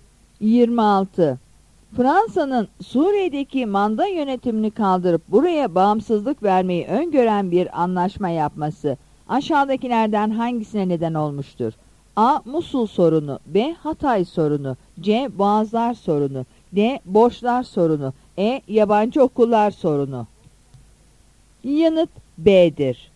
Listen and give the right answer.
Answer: Yanıt B'dir.